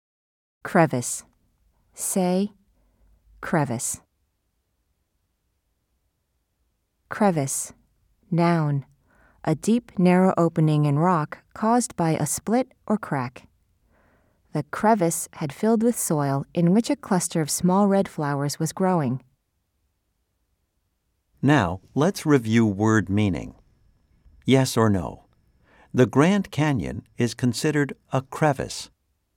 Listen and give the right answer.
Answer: If you said no, you are correct.